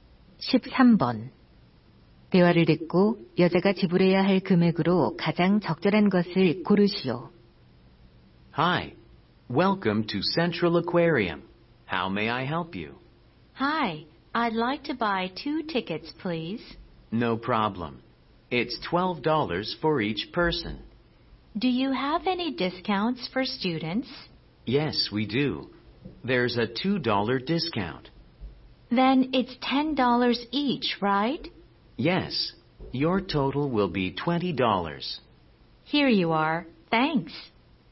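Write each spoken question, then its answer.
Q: 대화를 듣고 여자가 지불해야 할 금액으로 가장 적절한 것을 고르시오.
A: 20달러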